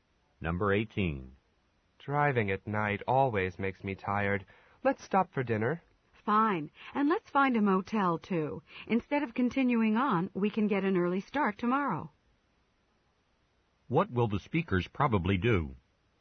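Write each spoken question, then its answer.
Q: What will the speakers probably do?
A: Stop for dinner and stay at a motel for the night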